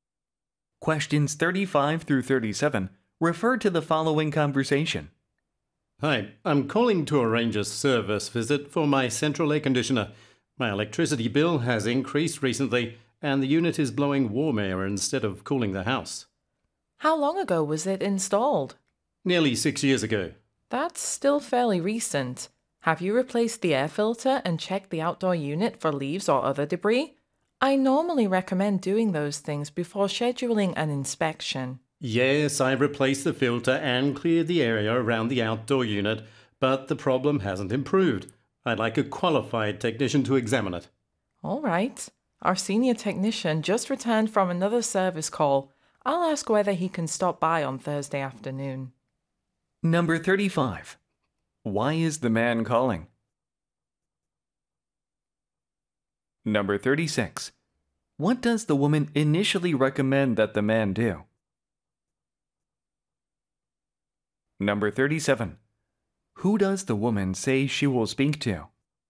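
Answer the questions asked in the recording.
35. To arrange a service visit for his air conditioner
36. Replace the air filter and check the outdoor unit for debris
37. The senior technician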